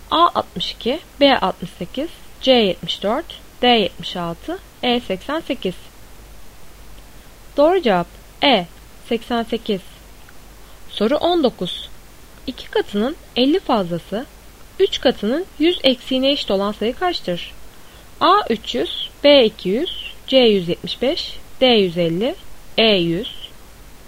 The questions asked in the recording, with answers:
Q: 2 katının 50 fazlası 3 katının 100 eksiğine eşit olan sayı kaçtır?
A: Doğru cevap D150.